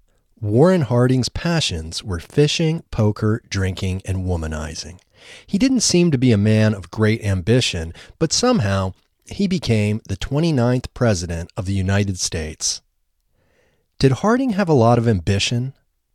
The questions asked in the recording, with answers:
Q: Did Harding have a lot of ambition?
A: No, Harding didn't have a lot of ambition.